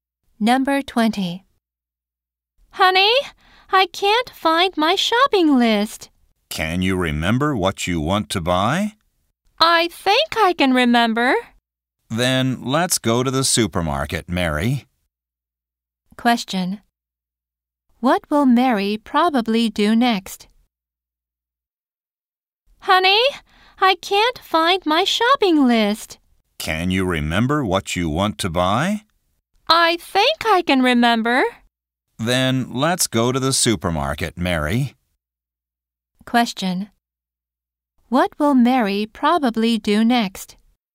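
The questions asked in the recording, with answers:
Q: What will Mary probably do next?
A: Go to the supermarket.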